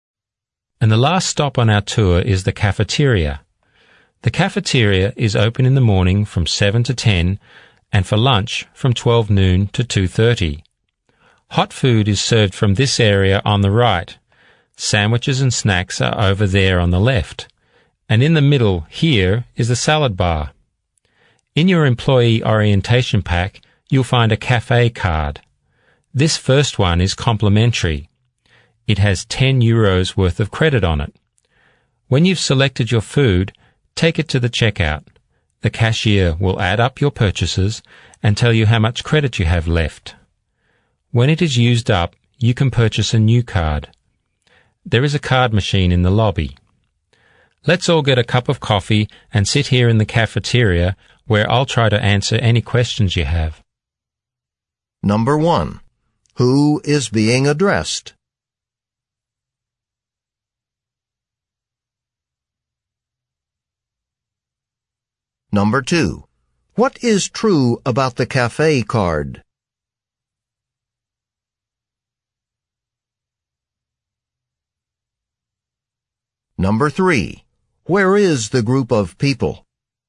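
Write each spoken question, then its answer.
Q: Who is being addressed?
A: New employees

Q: Where is the group of people?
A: In the cafeteria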